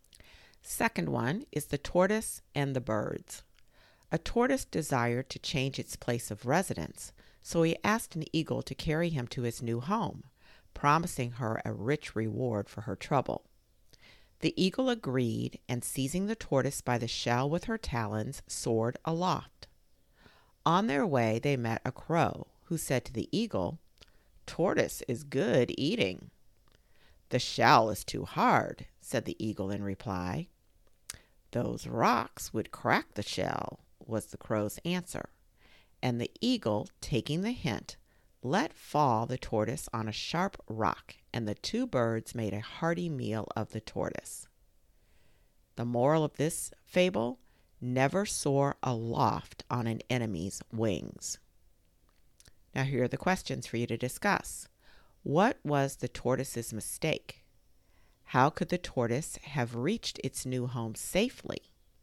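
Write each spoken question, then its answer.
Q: What was the tortoise's mistake?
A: It trusted an eagle (an enemy) to carry it aloft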